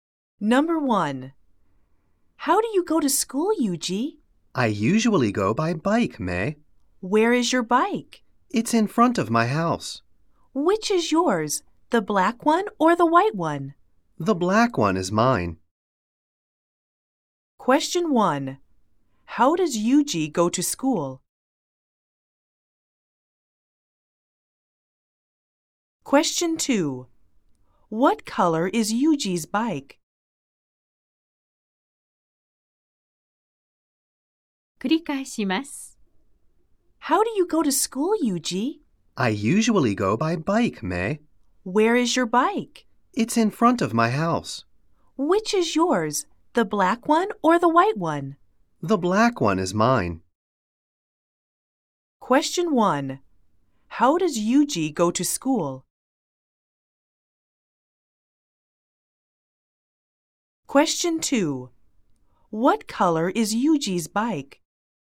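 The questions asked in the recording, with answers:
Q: How does Yuji go to school?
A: 自転車で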